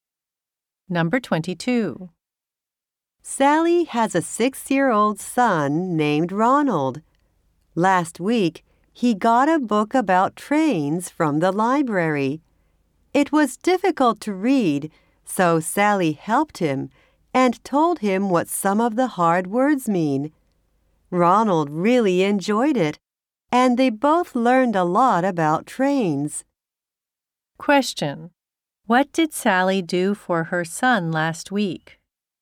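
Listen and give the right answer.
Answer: She helped him read a difficult book about trains.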